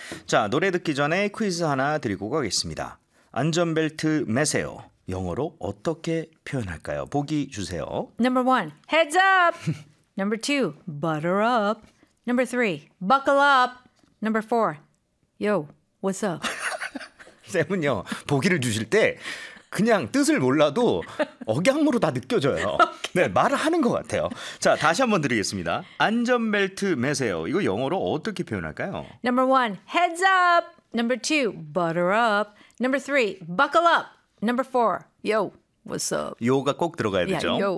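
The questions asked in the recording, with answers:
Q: 안전벨트 매세요. 영어로 어떻게 표현할까요?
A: 3: buckle up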